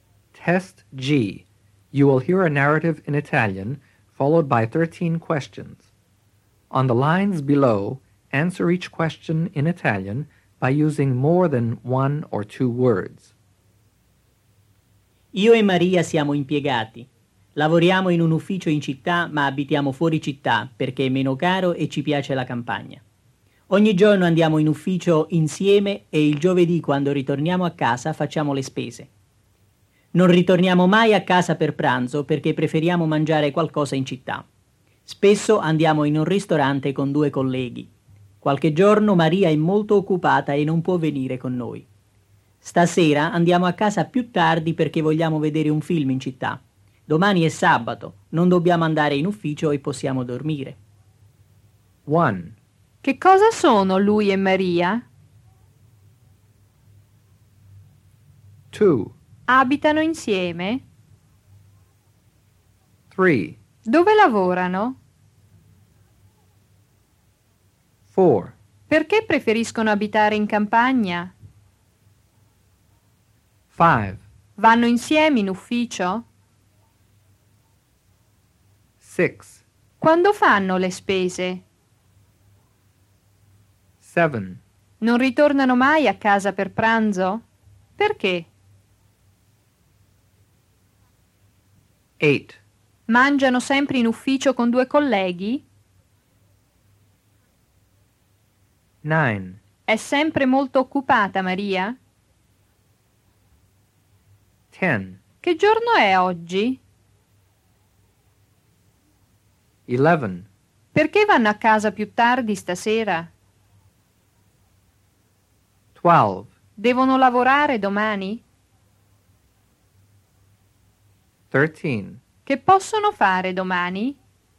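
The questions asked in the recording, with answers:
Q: Che cosa sono lui e Maria?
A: Sono impiegati.

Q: Dove lavorano?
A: In un ufficio in città.

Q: Perché preferiscono abitare in campagna?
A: Perché è meno caro e gli piace la campagna.

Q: Vanno insieme in ufficio?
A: Sì, ogni giorno vanno insieme.

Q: Quando fanno le spese?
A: Il giovedì, quando ritornano a casa.

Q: Non ritornano mai a casa per pranzo?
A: No, perché preferiscono mangiare qualcosa in città.

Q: Mangiano sempre in ufficio con due colleghi?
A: No, spesso vanno in un ristorante con due colleghi.

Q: È sempre molto occupata Maria?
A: No, solo qualche giorno.

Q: Che giorno è oggi?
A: Oggi è venerdì.

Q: Perché vanno a casa più tardi stasera?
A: Perché vogliono vedere un film in città.

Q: Devono lavorare domani?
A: No, domani è sabato.

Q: Che possono fare domani?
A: Possono dormire.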